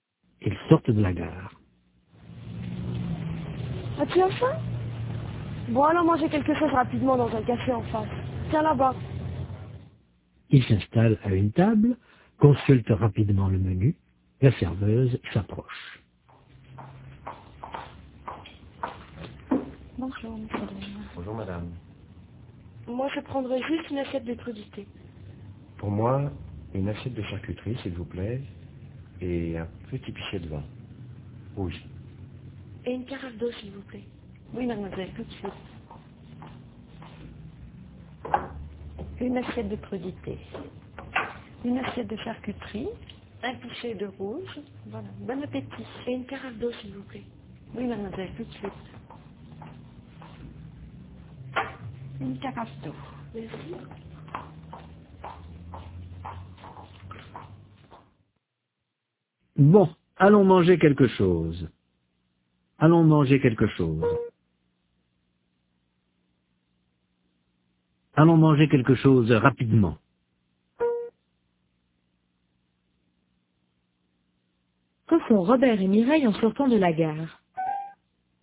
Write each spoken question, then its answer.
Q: Que font Robert et Mireille en sortant de la gare ?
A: Ils vont manger quelque chose rapidement.